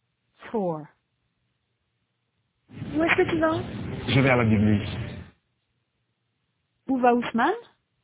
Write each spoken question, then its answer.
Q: Où va Ousmane?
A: À la bibliothèque. Il va à la bibliothèque.